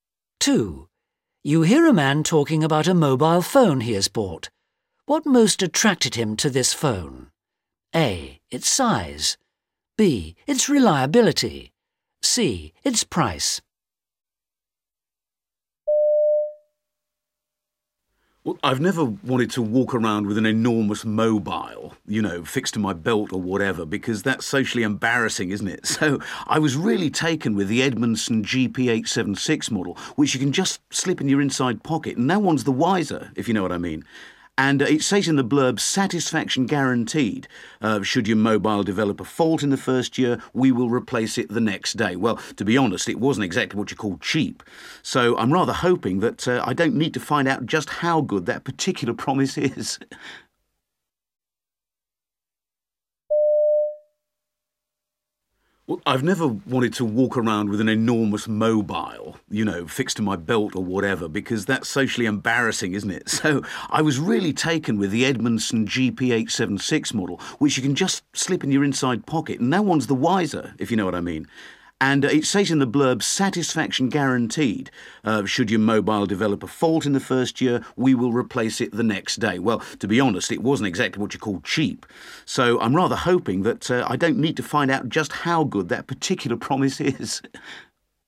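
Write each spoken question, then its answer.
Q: What most attracted him to this phone?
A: A: Its size.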